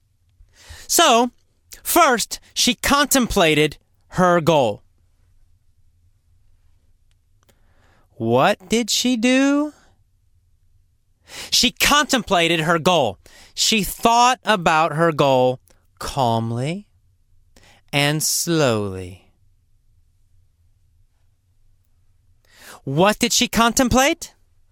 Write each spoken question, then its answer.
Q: What did she contemplate?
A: Her goal. She contemplated her goal.